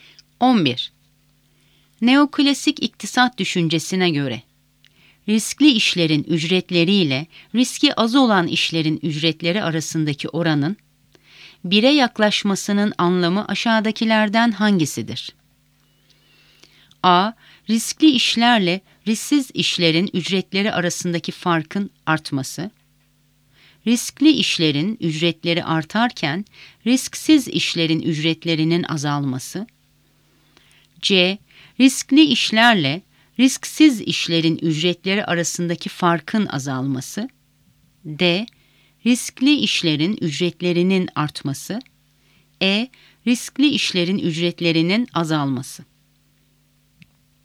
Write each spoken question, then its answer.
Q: Neoklasik iktisat düşüncesine göre, riskli işlerin ücretleriyle riski az olan işlerin ücretleri arasındaki oranın 1'e yaklaşmasının anlamı aşağıdakilerden hangisidir?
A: Doğru cevap C. Riskli işlerle risksiz işlerin ücretleri arasındaki farkın azalması.